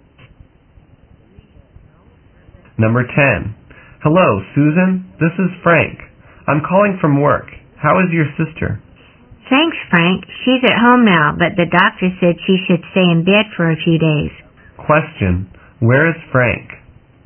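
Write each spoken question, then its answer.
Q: Where is Frank?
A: At work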